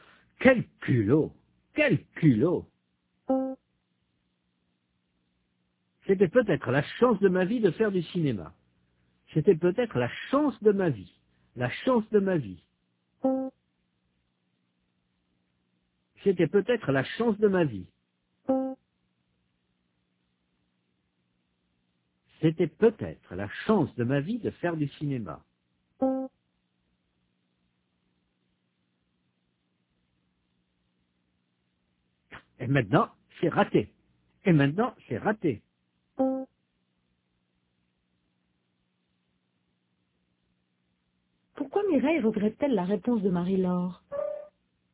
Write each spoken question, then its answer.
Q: Pourquoi Mireille regrette-t-elle la réponse de Marie-Laure?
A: Parce que c'était peut-être la chance de sa vie de faire du cinéma.